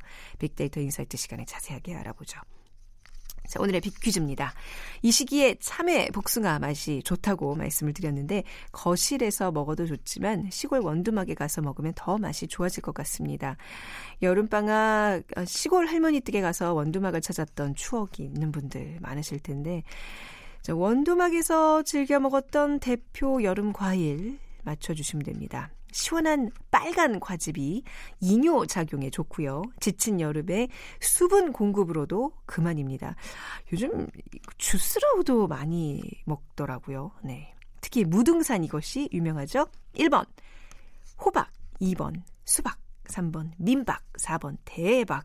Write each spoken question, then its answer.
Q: 자, 원두막에서 즐겨 먹었던 대표 여름 과일 맞춰주시면 됩니다.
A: 오늘 빅키즈 정답은 2번 수박입니다.